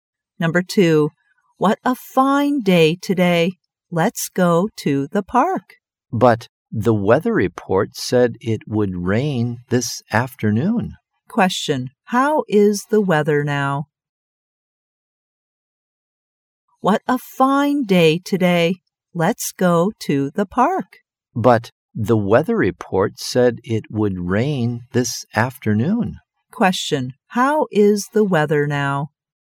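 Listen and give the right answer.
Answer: Fine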